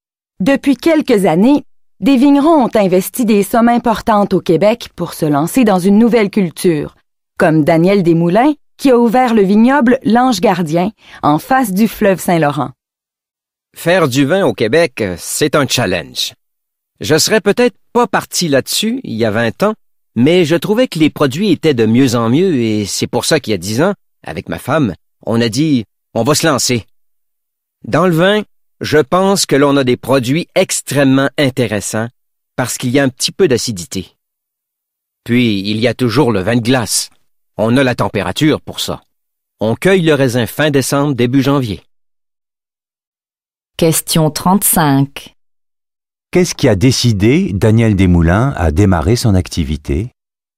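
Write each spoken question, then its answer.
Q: Qu'est-ce qui a décidé Daniel Desmoulins à démarrer son activité?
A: L'amélioration de la qualité des vins québécois (les produits étaient de mieux en mieux).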